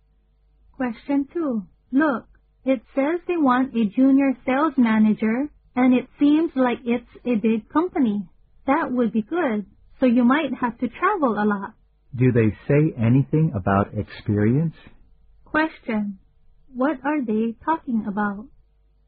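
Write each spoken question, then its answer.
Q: What are they talking about?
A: A job advertisement (for a junior sales manager)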